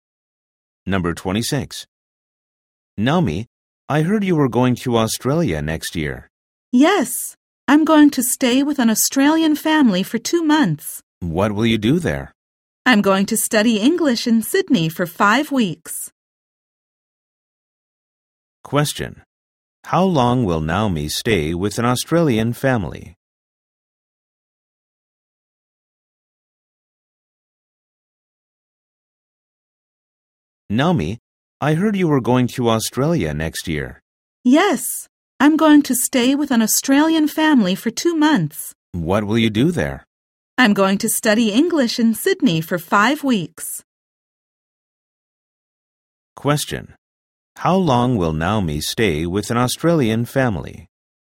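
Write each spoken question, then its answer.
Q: How long will Naomi stay with an Australian family?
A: For 2 months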